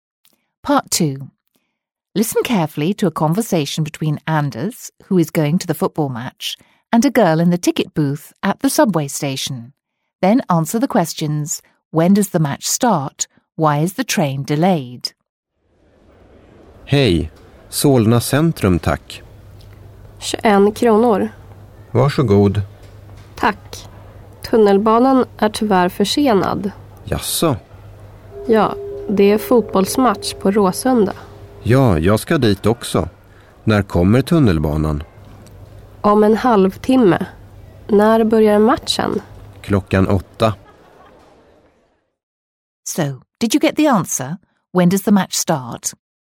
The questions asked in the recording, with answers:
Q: when does the match start?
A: That's right, it starts at 8 o'clock.

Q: Why is the train delayed?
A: there's a match at Råsunda, so a lot of people are travelling.